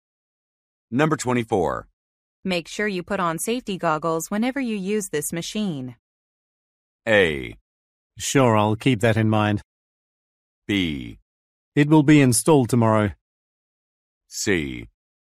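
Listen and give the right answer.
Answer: A: Sure, I'll keep that in mind.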